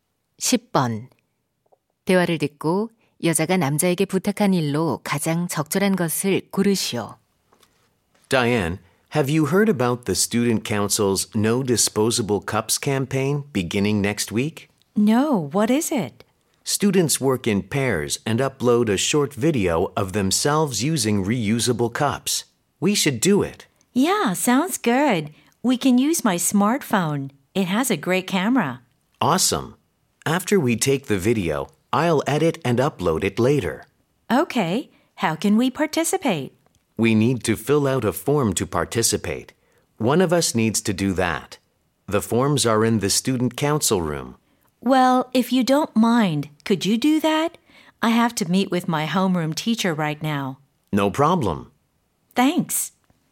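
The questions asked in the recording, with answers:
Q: 대화를 듣고 여자가 남자에게 부탁한 일로 가장 적절한 것을 고르시오.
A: 캠페인 참가 신청서 작성하기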